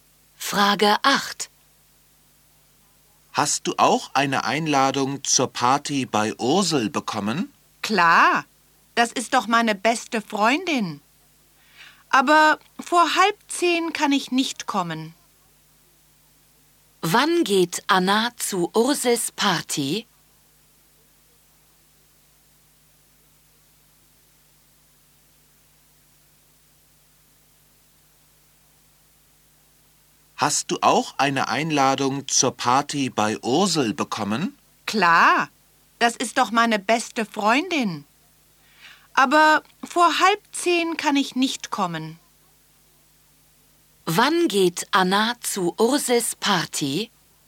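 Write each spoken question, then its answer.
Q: Wann geht Anna zu Ursels Party?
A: Nicht vor 9:30 Uhr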